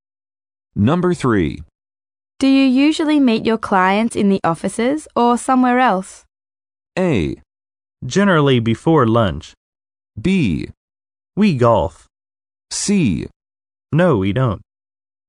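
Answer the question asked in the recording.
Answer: B: We golf.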